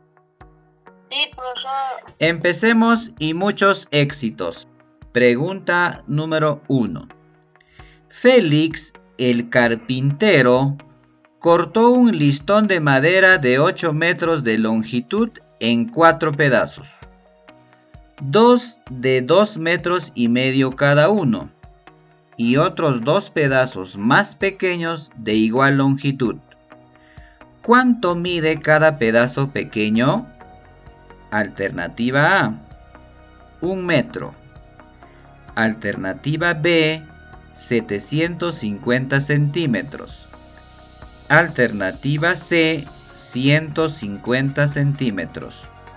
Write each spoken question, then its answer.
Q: ¿Cuánto mide cada pedazo pequeño?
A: La respuesta correcta es la alternativa C, 150 centímetros.